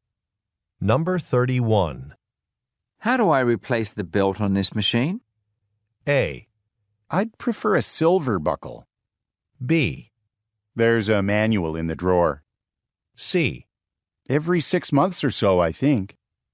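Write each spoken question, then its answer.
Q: How do I replace the belt on this machine?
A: B: There's a manual in the drawer.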